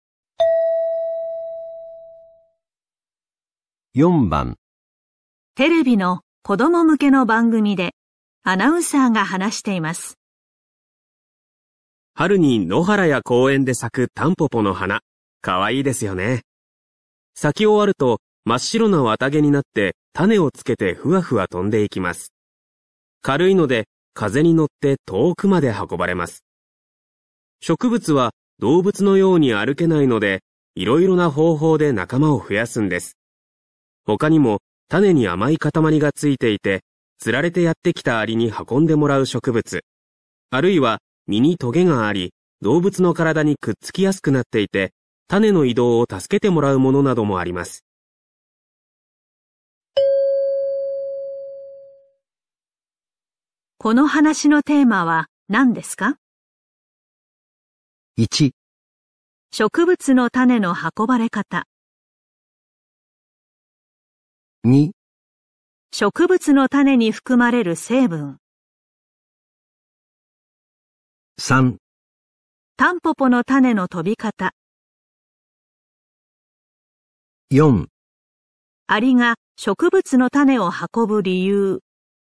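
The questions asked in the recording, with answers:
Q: この話のテーマは何ですか?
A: 1: 植物の種の運ばれ方。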